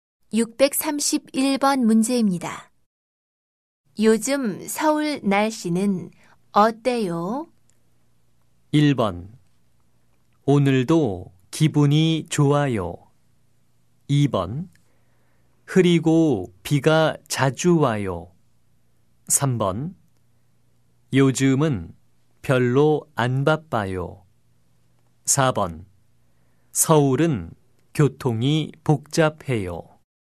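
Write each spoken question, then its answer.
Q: 요즘 서울 날씨는 어때요?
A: 2: 흐리고 비가 자주 와요.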